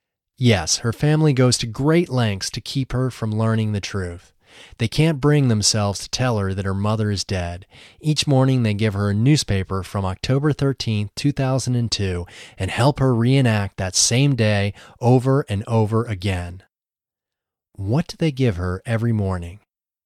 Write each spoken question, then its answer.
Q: What do they give her every morning?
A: They give her a newspaper from October 13, 2002 every morning.